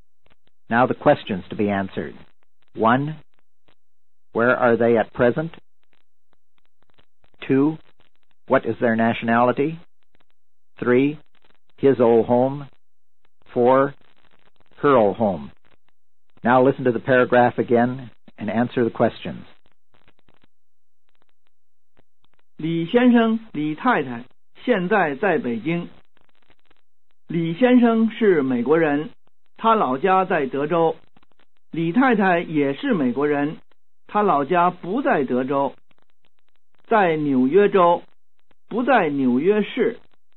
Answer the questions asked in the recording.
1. In Beijing.
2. Both of them are American.
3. His old home, Texas.
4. Her old home, New York State, not New York City.